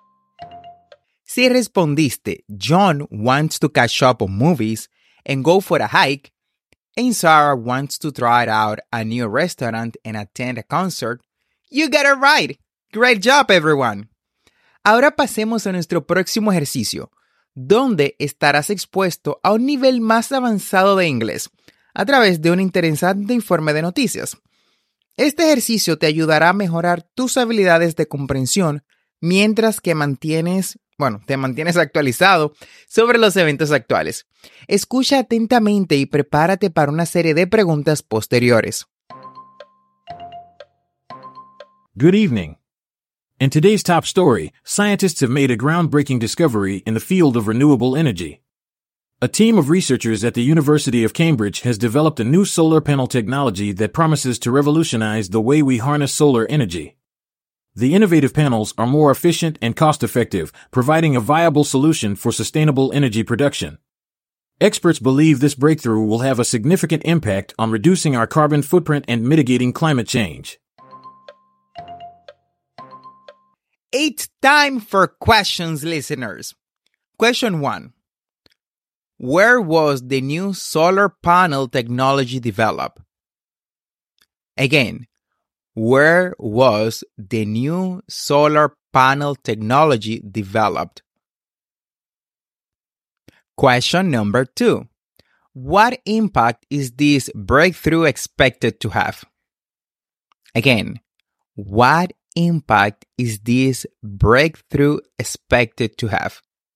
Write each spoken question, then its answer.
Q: Where was the new solar panel technology developed?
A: the new solar panel technology was developed at the University of Cambridge

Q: What impact is this breakthrough expected to have?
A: this breakthrough is expected to have a significant impact on reducing our carbon footprint and mitigating climate change